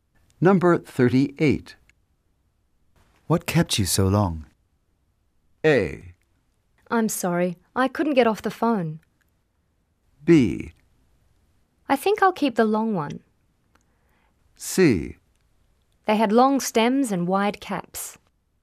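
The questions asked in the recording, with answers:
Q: What kept you so long?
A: A: I'm sorry, I couldn't get off the phone.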